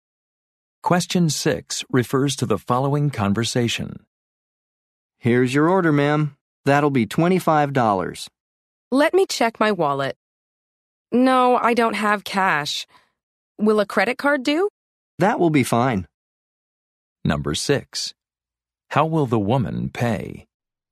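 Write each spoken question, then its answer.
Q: How will the woman pay?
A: By credit card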